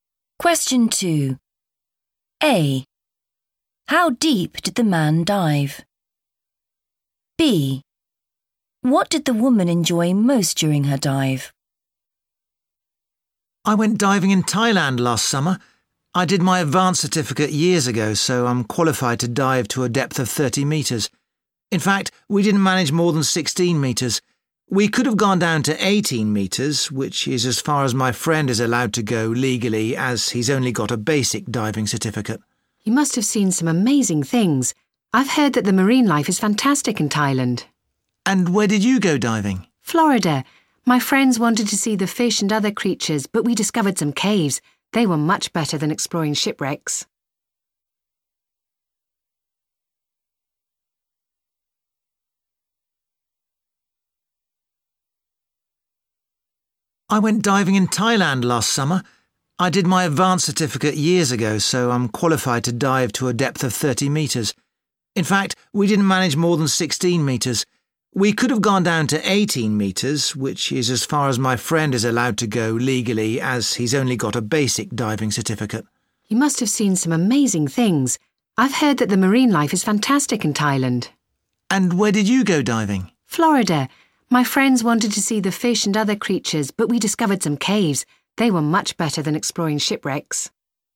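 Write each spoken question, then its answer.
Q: How deep did the man dive?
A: 16 metres

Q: What did the woman enjoy most during her dive?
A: the caves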